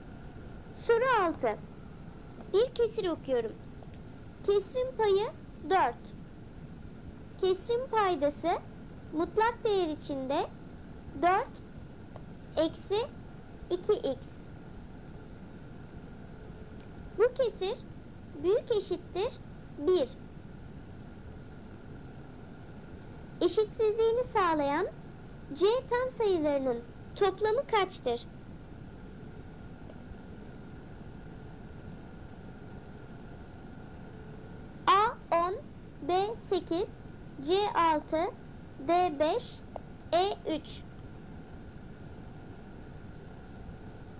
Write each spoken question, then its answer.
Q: Eşitsizliğini sağlayan C tam sayılarının toplamı kaçtır?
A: Doğru cevap B 8.